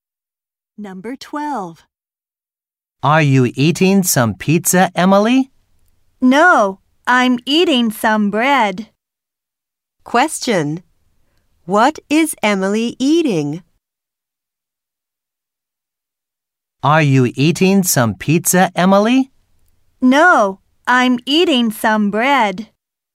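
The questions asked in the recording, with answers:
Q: What is Emily eating?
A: Some bread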